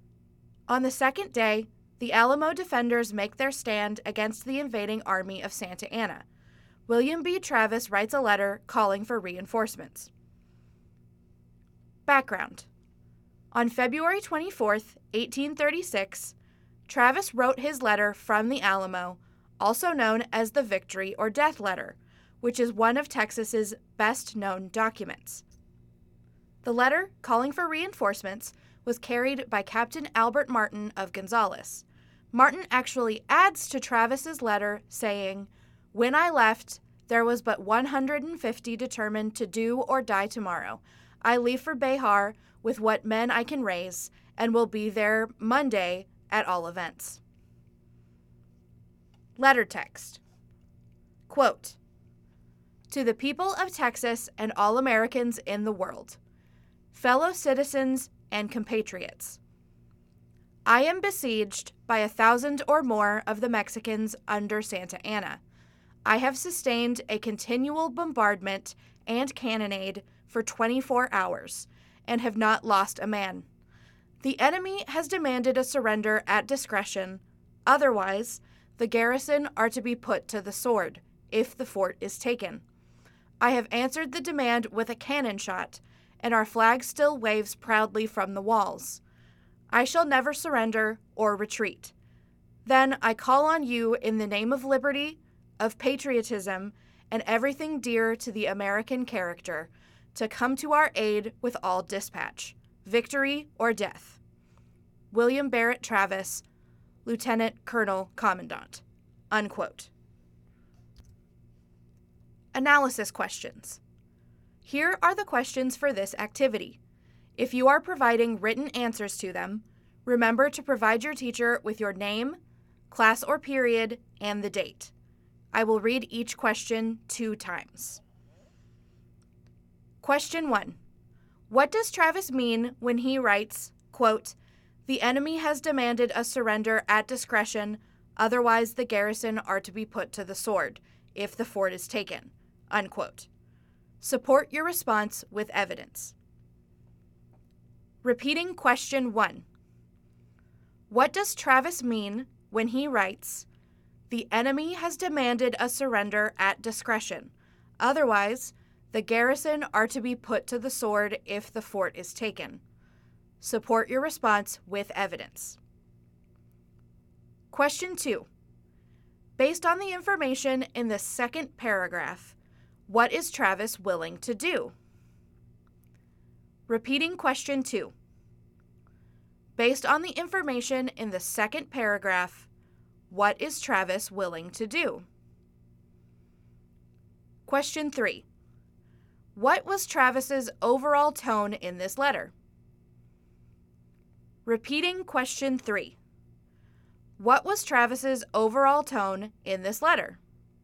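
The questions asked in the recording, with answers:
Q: What does Travis mean when he writes, quote, "The enemy has demanded a surrender at discretion, otherwise the garrison are to be put to the sword, if the fort is taken," unquote.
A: Santa Anna has demanded that the defenders surrender unconditionally; if they refuse and the fort is taken, they will all be killed.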